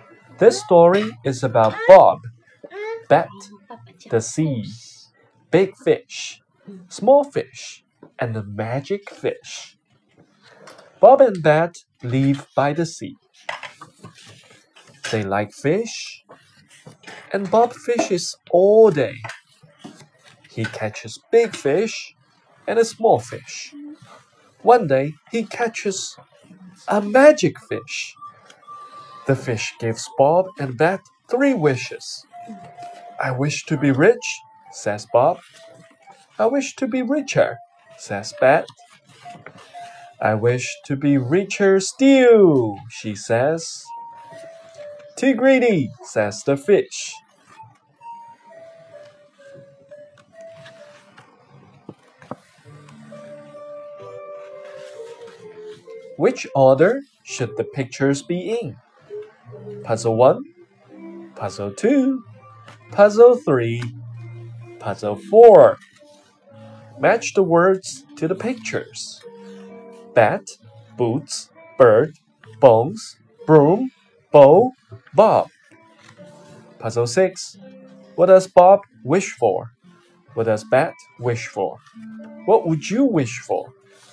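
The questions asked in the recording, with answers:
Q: What does Bob wish for?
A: To be rich

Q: What does Bet wish for?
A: To be richer, and then richer still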